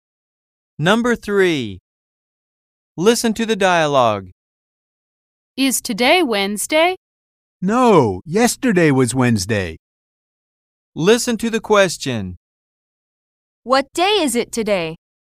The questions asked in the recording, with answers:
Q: What day is it today?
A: It's Thursday.